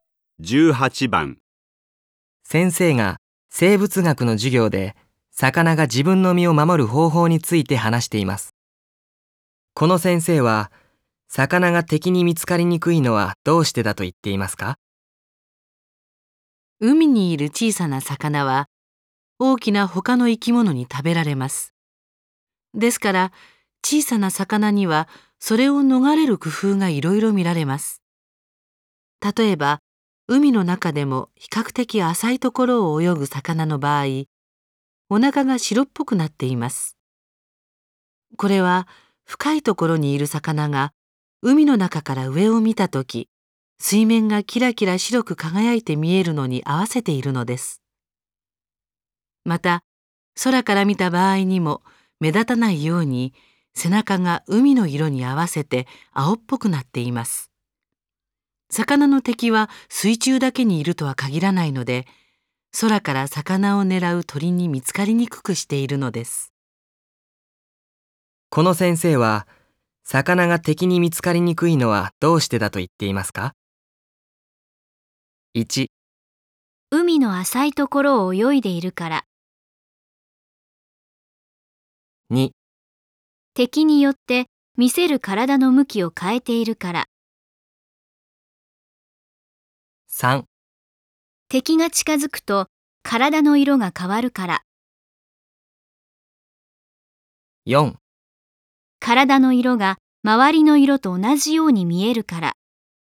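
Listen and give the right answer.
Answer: 4: 体の色が周りの色と同じように見えるから。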